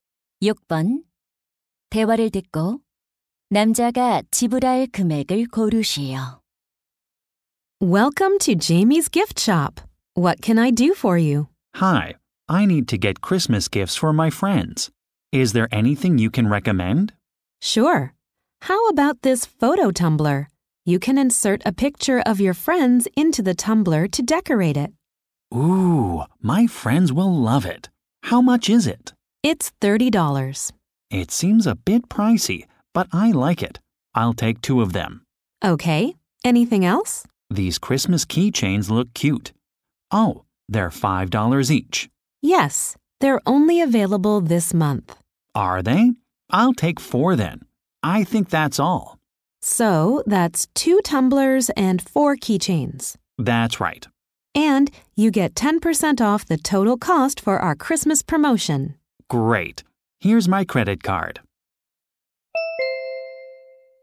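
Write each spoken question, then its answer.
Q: 대화를 듣고 남자가 지불할 금액을 고르시오.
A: $72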